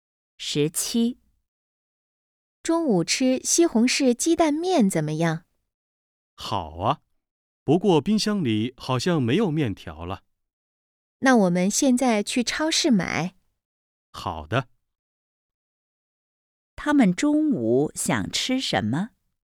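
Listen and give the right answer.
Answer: 西红柿鸡蛋面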